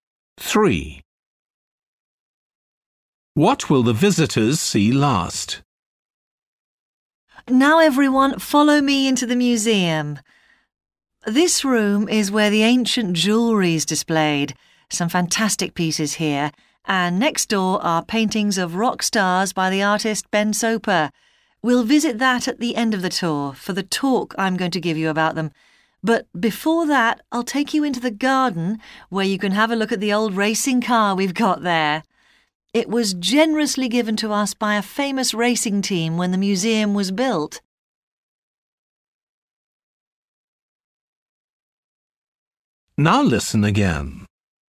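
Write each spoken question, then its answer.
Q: What will the visitors see last?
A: the paintings of rock stars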